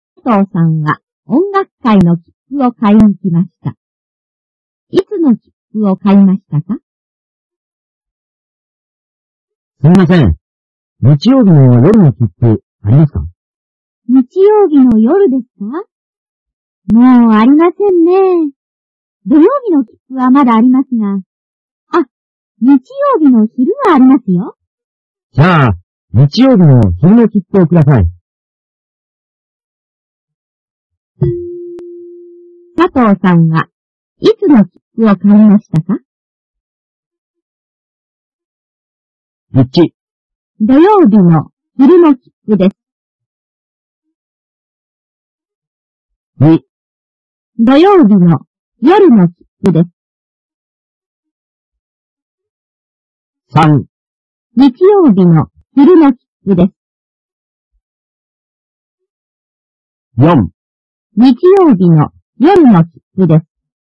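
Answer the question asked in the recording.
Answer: 3: 日曜日の昼の切符です。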